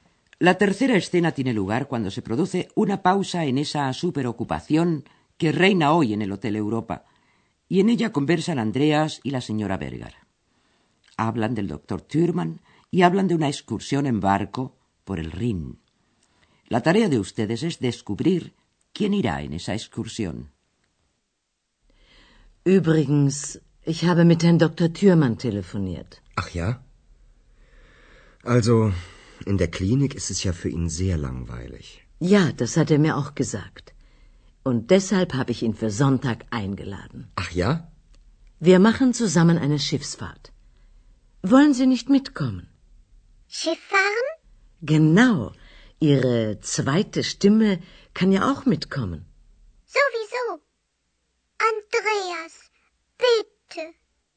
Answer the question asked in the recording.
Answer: La señora Berger ha invitado al doctor Thürmann a una excursión en barco por el Rin.